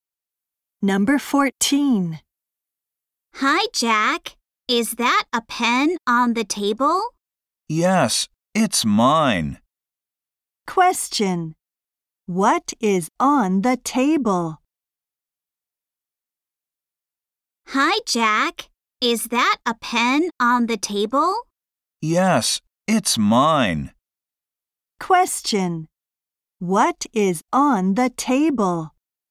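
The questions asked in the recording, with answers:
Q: What is on the table?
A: A pen (Jack's)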